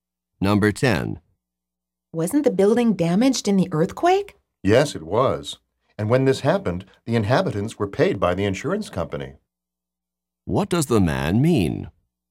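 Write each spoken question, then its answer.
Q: What does the man mean?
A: The insurance company paid the inhabitants for the earthquake damage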